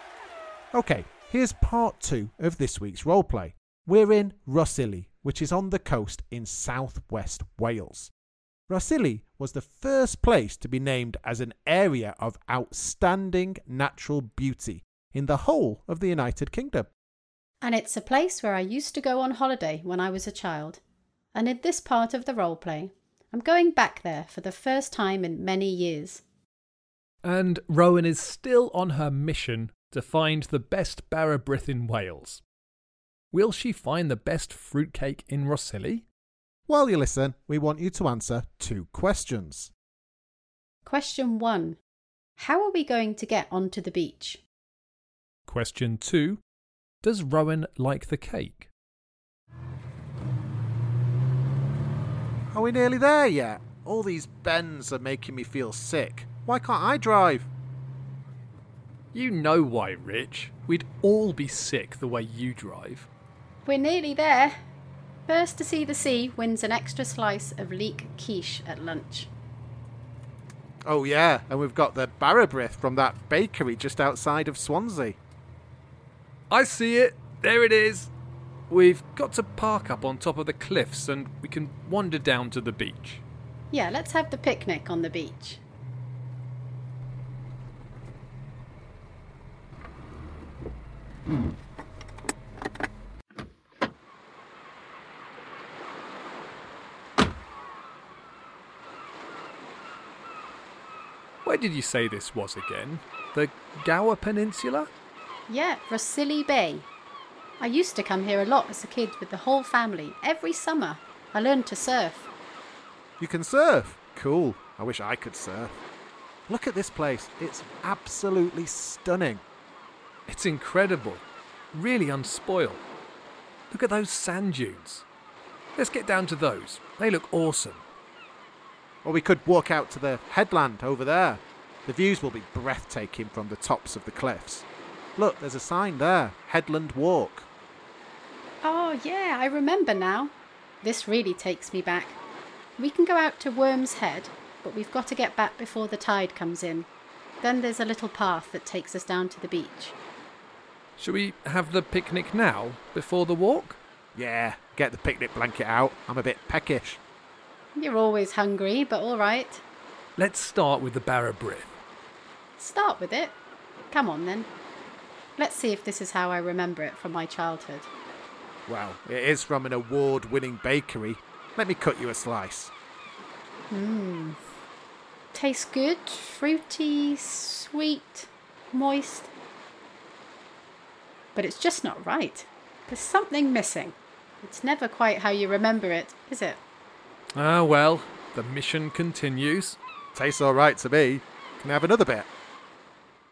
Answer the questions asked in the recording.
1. The answer is, we have to follow a small path down through the cliffs.
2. Well, I liked it, but it still wasn't as good as the ones I ate as a child.